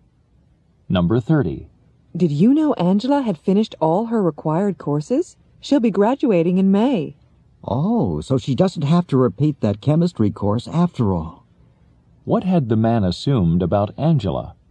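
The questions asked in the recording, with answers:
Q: What had the man assumed about Angela?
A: That she had to repeat the chemistry course.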